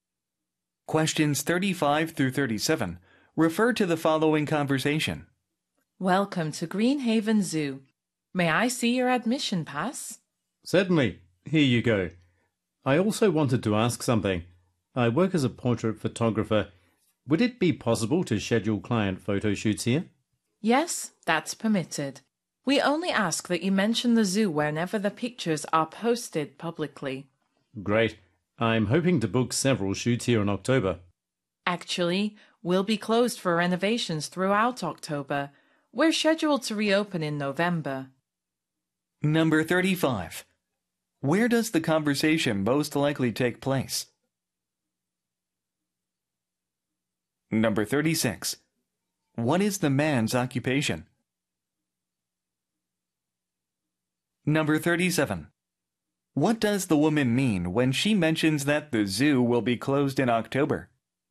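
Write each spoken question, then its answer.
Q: Where does the conversation most likely take place?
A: At a zoo

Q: What is the man's occupation?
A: Portrait photographer

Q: What does the woman mean when she mentions that the zoo will be closed in October?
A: The man cannot book photo shoots in October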